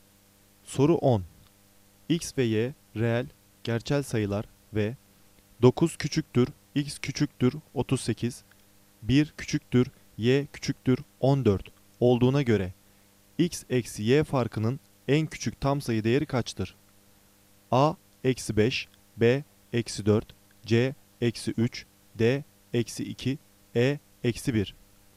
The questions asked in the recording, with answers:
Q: X ve Y reel, gerçel sayılar ve 9 küçüktür, X küçüktür 38, 1 küçüktür, Y küçüktür 14 olduğuna göre X eksi Y farkının en küçük tam sayı değeri kaçtır?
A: Doğru cevap B, eksi 4.